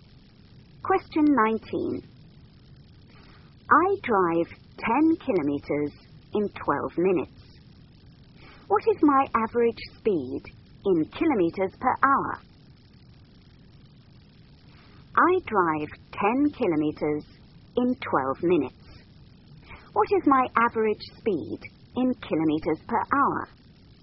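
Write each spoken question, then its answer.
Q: What is my average speed in kilometers per hour?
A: 50 km/h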